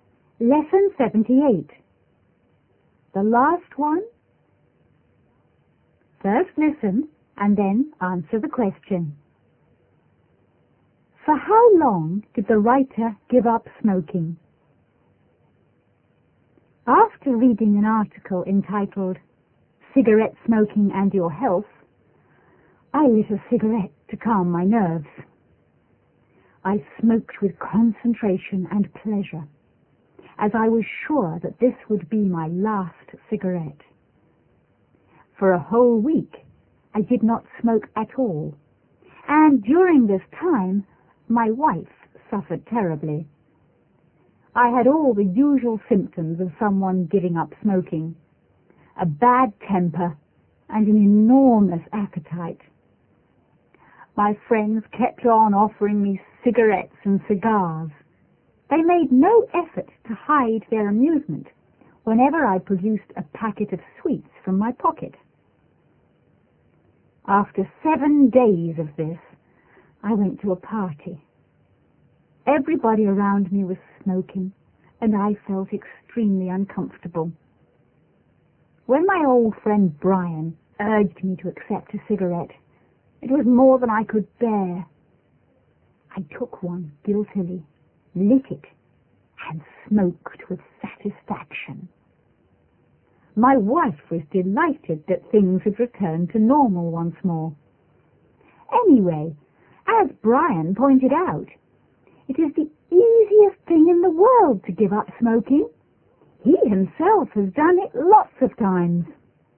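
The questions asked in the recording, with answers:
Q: For how long did the writer give up smoking?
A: For a whole week (7 days)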